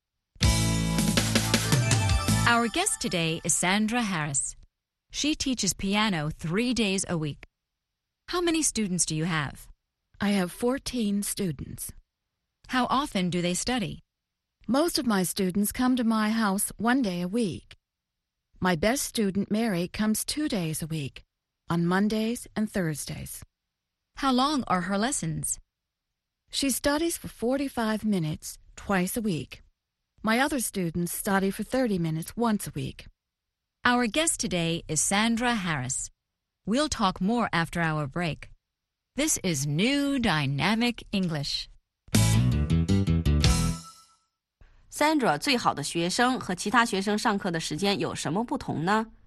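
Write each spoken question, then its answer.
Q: Sandra, 最好的学生和其他学生上课的时间有什么不同呢?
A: 最好的学生Mary每星期上两次课,每次45分钟;其他学生每星期一次,每次30分钟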